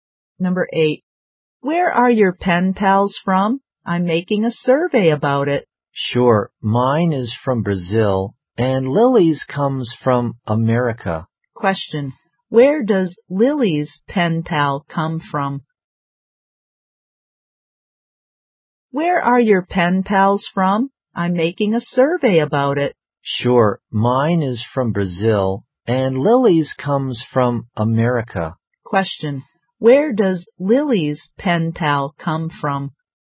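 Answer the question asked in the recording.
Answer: America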